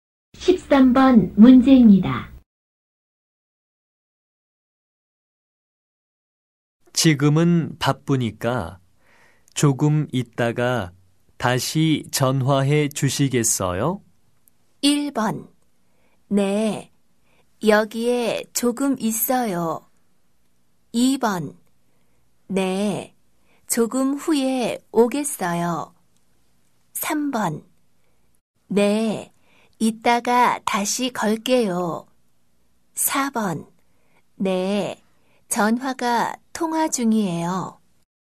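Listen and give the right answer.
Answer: 3: 네, 이따가 다시 걸게요.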